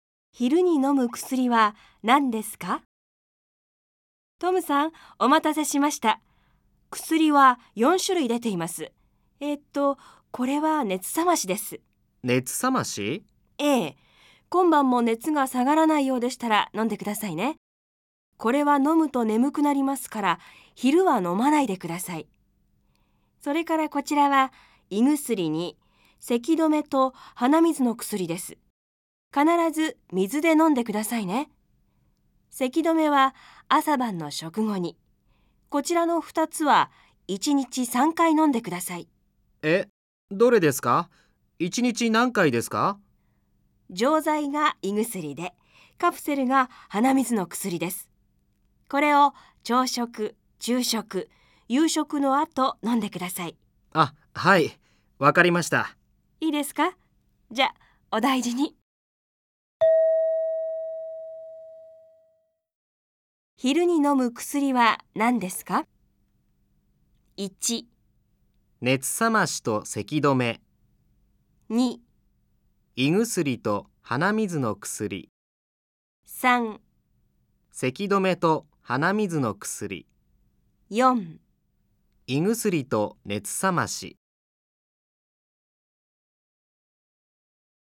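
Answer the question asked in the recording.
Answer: 2: 胃薬と鼻水の薬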